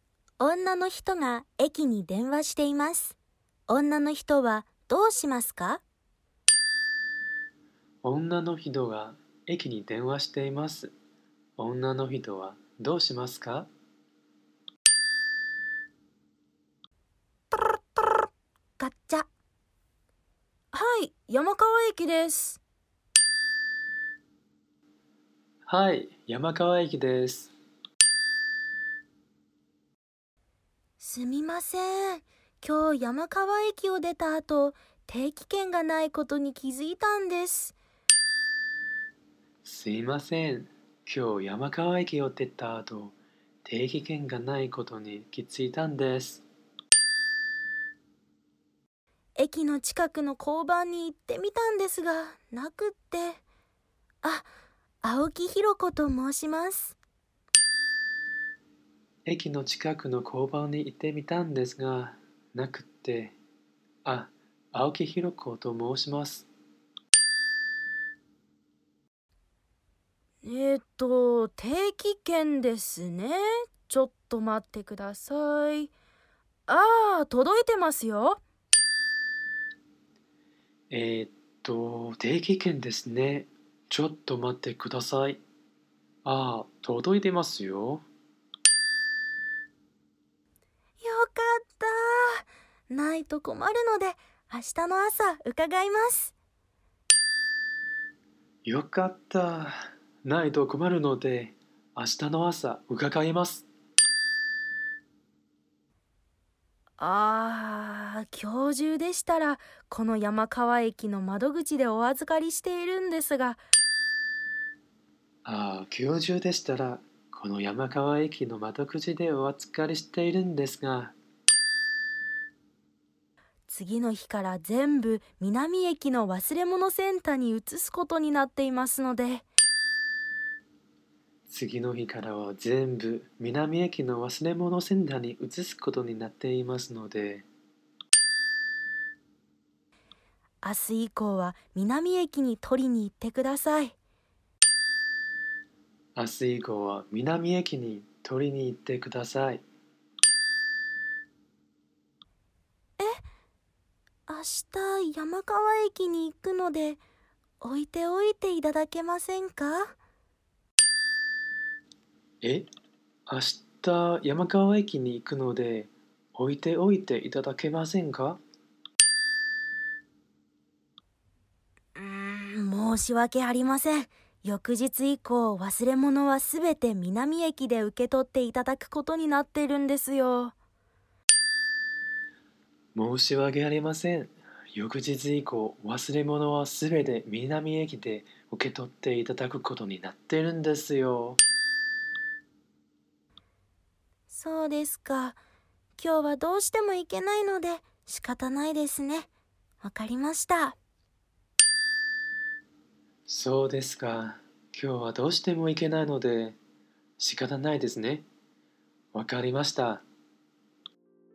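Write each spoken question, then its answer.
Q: 女の人が駅に電話しています。女の人はどうしますか?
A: 明日以降、南駅の忘れ物センターに定期券を取りに行く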